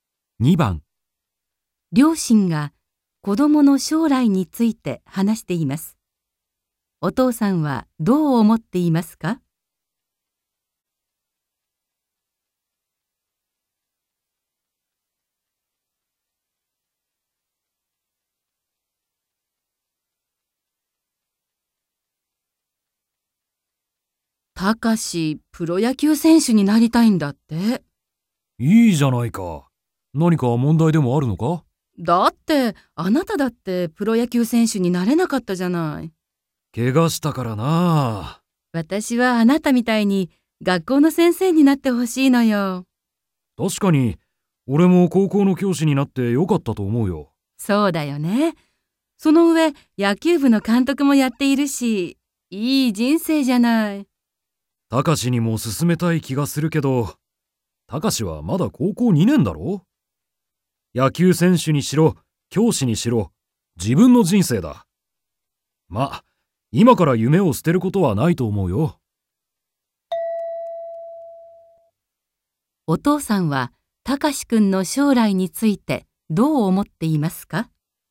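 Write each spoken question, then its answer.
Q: お父さんは、たかしくんの将来についてどう思っていますか?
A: 自分の人生なので、今から夢(プロ野球選手)を捨てる必要はないと思っている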